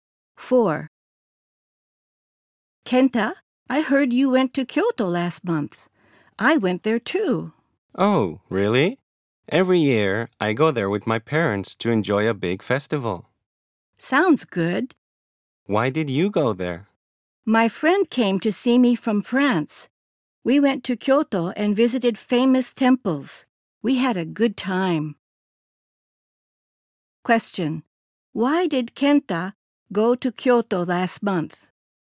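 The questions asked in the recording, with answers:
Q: Why did Kenta go to Kyoto last month?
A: Because his friend came to see him from France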